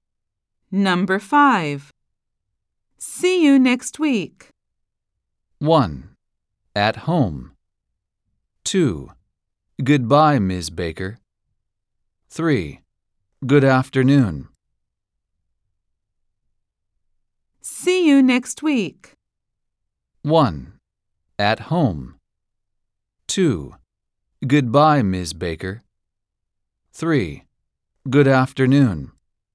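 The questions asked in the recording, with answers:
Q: See you next week.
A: 2: Goodbye, Ms. Baker.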